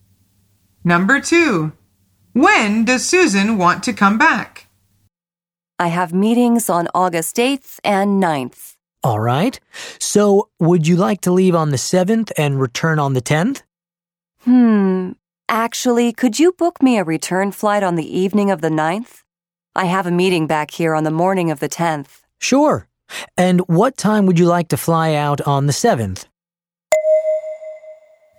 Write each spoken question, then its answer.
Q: When does Susan want to come back?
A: The answer is the 9th.